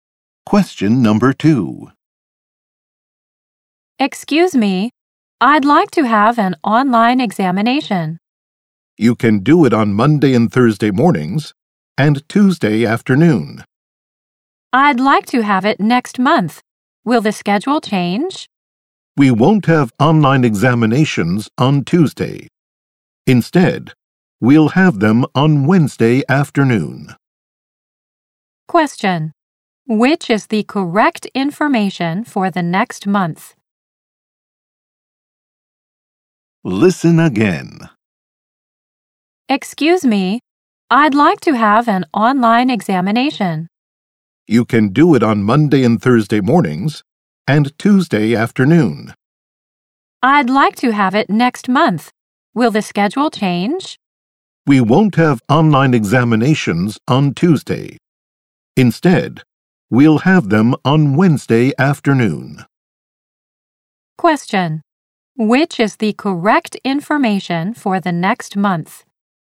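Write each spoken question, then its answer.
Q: Which is the correct information for the next month?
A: Exams on Monday and Thursday mornings and Wednesday afternoon (none on Tuesday)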